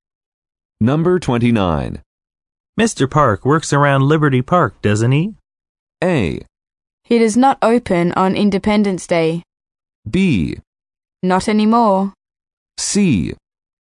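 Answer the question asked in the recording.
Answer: B: Not anymore.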